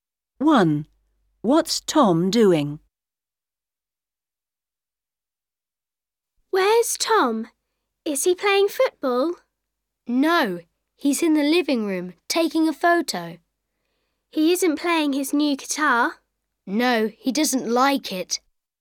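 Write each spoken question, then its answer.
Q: What's Tom doing?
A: Taking a photo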